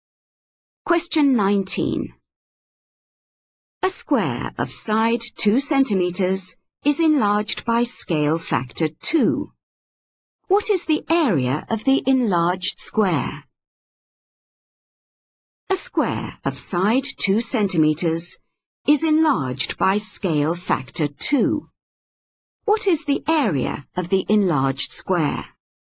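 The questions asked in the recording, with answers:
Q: What is the area of the enlarged square?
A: 16 square centimeters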